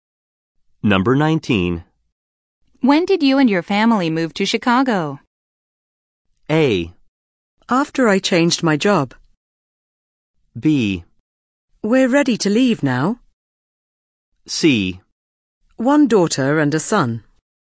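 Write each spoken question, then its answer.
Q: When did you and your family move to Chicago?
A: A: After I changed my job.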